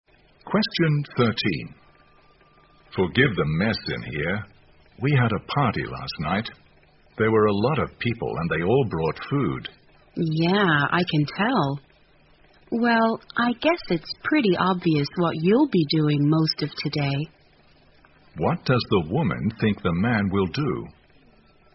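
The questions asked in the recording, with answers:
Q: What does the woman think the man will do?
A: Clean up the room after the party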